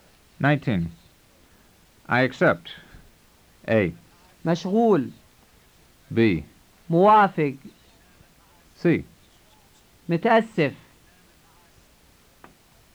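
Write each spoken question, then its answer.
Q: I accept.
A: B: موافق.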